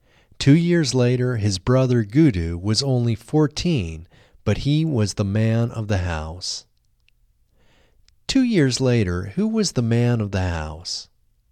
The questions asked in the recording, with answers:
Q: 2 years later, who was the man of the house?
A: 2 years later, his brother Gudu was the man of the house.